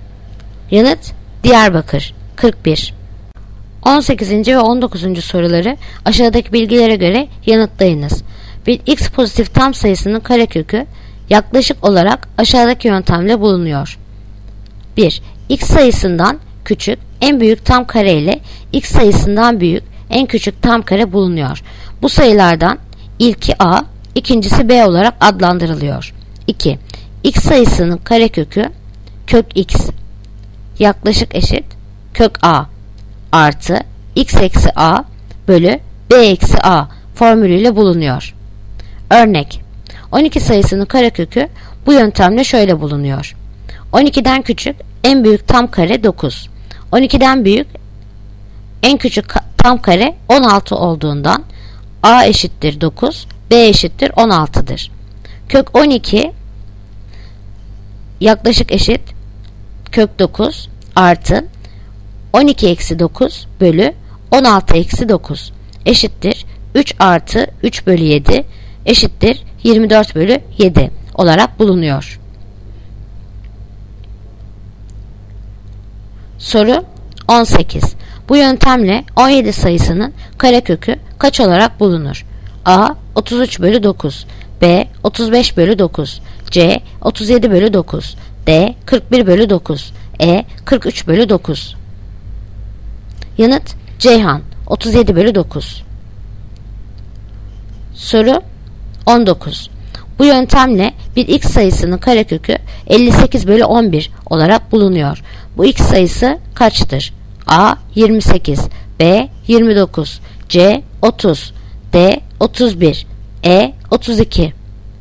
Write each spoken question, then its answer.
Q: Bu yöntemle 17 sayısının karekökü kaç olarak bulunur?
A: Yanıt Ceyhan 37 bölü 9.